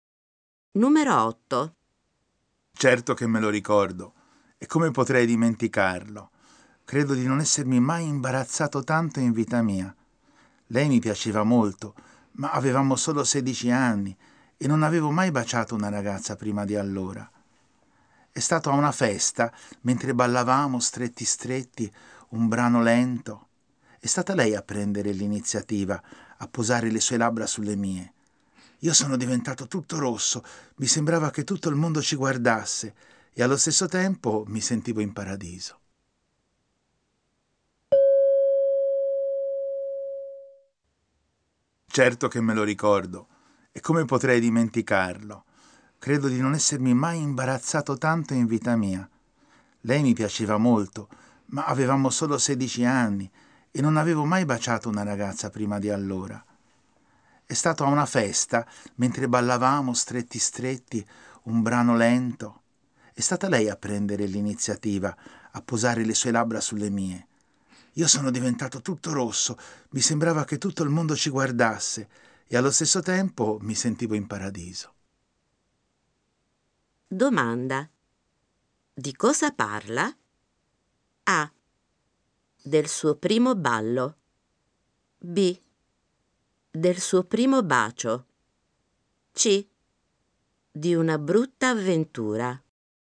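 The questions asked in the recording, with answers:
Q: Domanda. Di cosa parla?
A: B: Del suo primo bacio.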